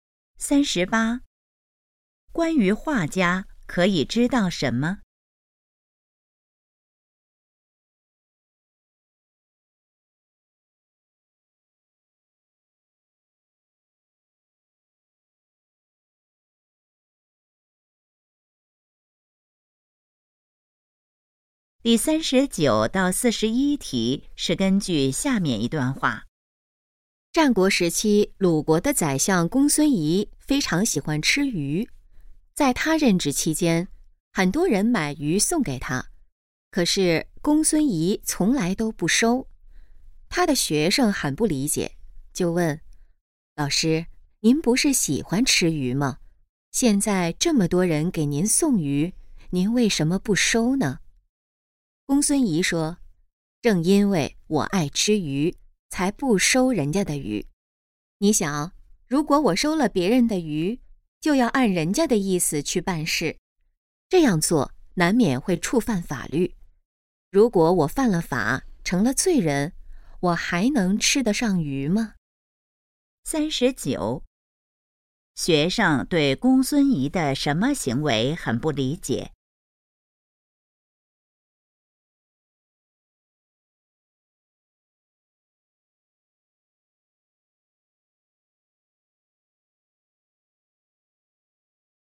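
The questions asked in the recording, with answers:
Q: 学生对公孙仪的什么行为很不理解?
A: 喜欢吃鱼却不收别人送的鱼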